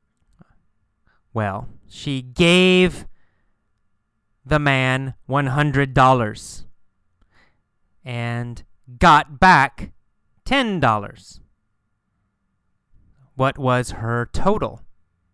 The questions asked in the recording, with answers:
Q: What was her total?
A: Her total was $90, right?